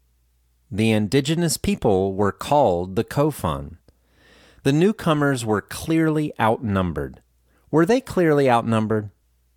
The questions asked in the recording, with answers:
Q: Were they clearly outnumbered?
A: Yes, the newcomers were clearly outnumbered.